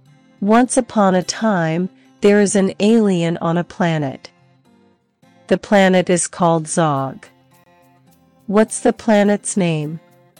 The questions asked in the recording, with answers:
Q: What's the planet's name?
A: Zog. The planet's name is Zog.